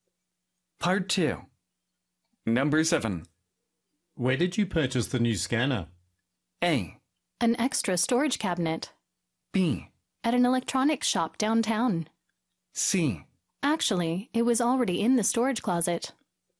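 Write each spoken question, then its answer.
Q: Where did you purchase the new scanner?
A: B: At an electronics shop downtown.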